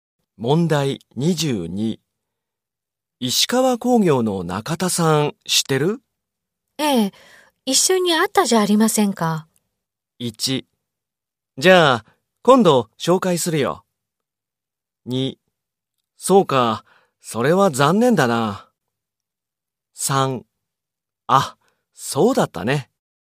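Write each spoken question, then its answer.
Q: 石川工業の中田さん知ってる?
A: 2: あ、そうだったね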